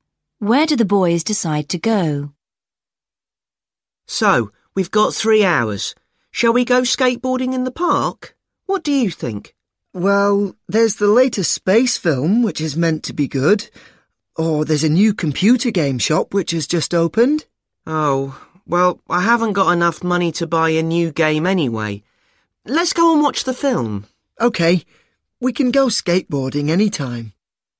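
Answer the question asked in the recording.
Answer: To the cinema to watch the space film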